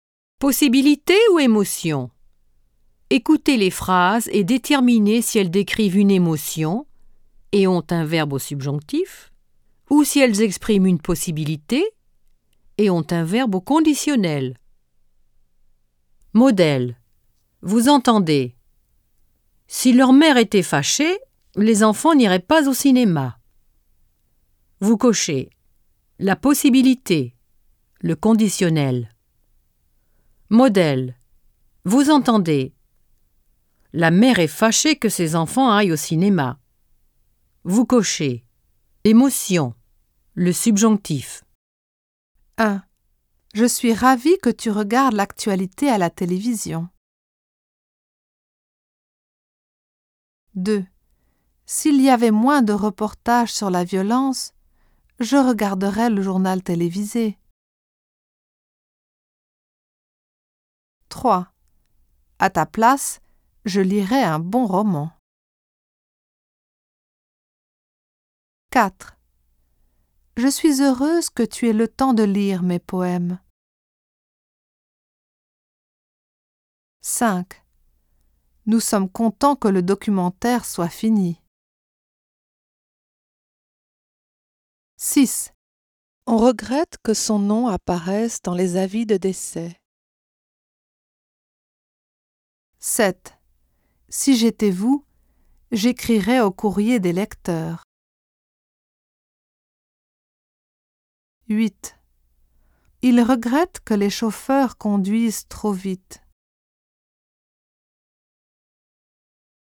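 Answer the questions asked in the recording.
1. Émotion, subjonctif
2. Possibilité, conditionnel
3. Possibilité, conditionnel
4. Émotion, subjonctif
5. Émotion, subjonctif
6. Émotion, subjonctif
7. Possibilité, conditionnel
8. Émotion, subjonctif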